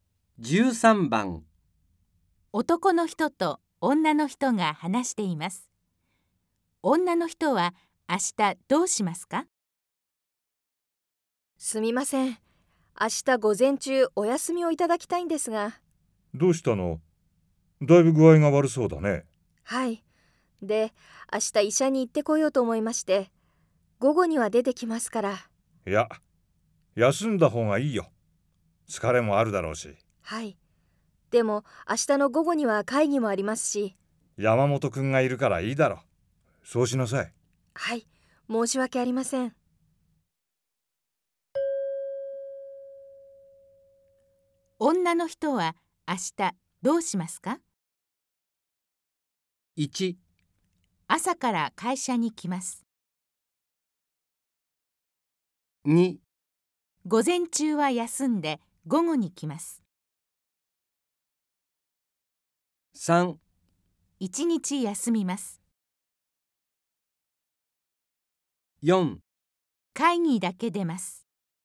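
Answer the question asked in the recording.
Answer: 3: 一日休みます。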